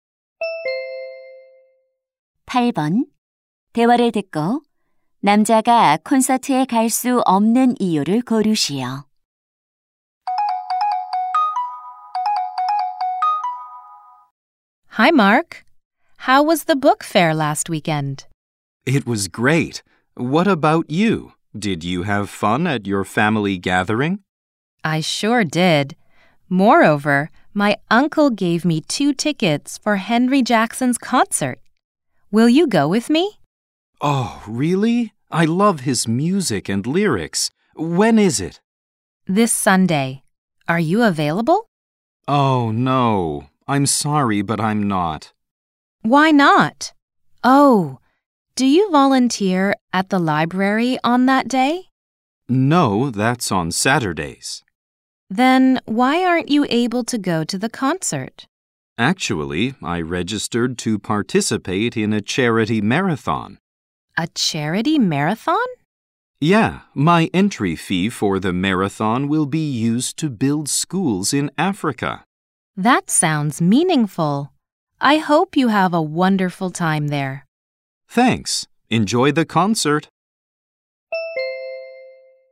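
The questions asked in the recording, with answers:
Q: 대화를 듣고 남자가 콘서트에 갈 수 없는 이유를 고르시오.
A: 자선 마라톤에 참가해야 해서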